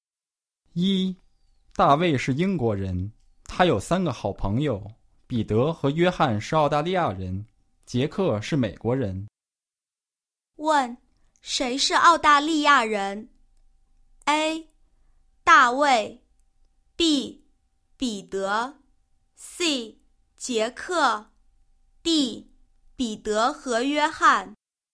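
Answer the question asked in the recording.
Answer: D: 彼得和约翰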